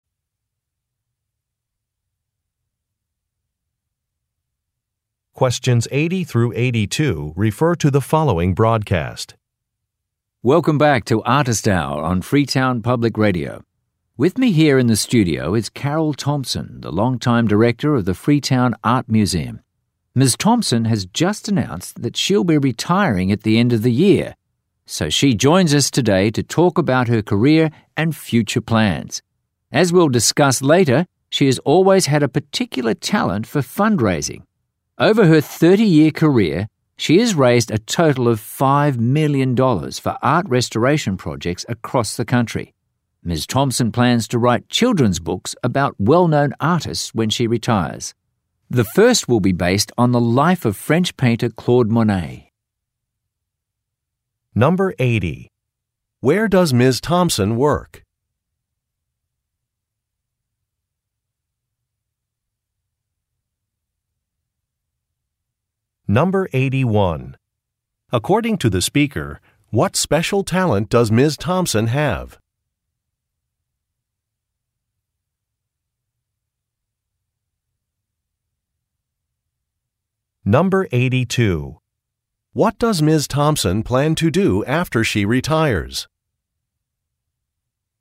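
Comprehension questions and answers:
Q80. Where does Ms. Thompson work?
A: At a museum

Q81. According to the speaker, what special talent does Ms. Thompson have?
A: Raising money

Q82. What does Ms. Thompson plan to do after she retires?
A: Become an author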